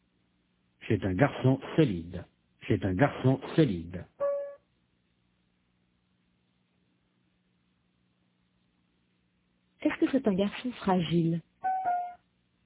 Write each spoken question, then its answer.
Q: Est-ce que c'est un garçon fragile?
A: Non, c'est un garçon solide.